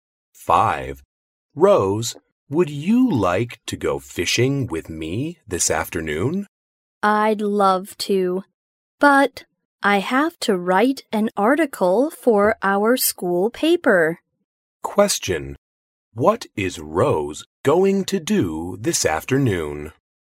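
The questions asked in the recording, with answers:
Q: What is Rose going to do this afternoon?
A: Write an article for the school paper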